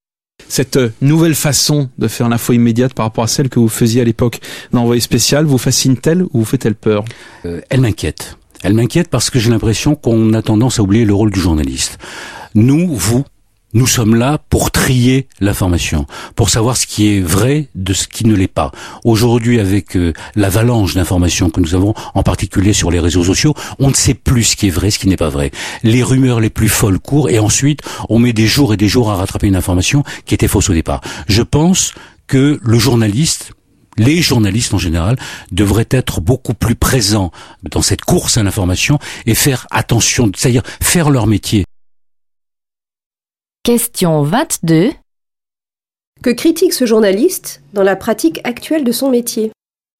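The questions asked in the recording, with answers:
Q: Que critique ce journaliste dans la pratique actuelle de son métier ?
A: On oublie le rôle du journaliste : trier l'information et vérifier ce qui est vrai, face aux rumeurs des réseaux sociaux.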